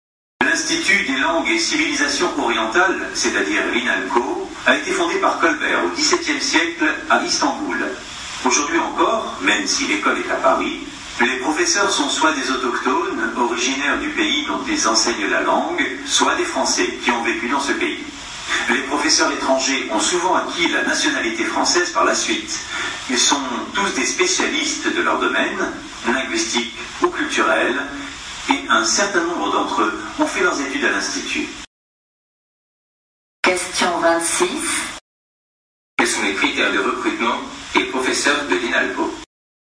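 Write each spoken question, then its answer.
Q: Quels sont les critères de recrutement des professeurs de l'INALCO?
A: Être originaire du pays dont ils enseignent la langue ou être Français et avoir vécu dans ce pays, et être spécialiste de leur domaine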